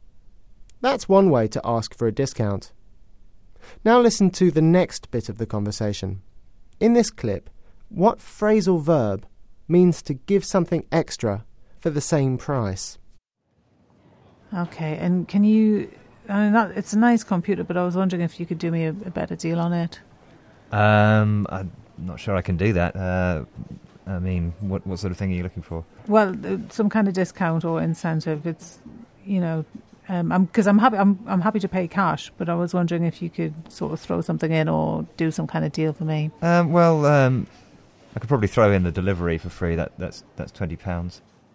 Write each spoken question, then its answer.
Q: In this clip, what phrasal verb means to give something extra for the same price?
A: That phrasal verb, "throw in," means to give something extra for the same price.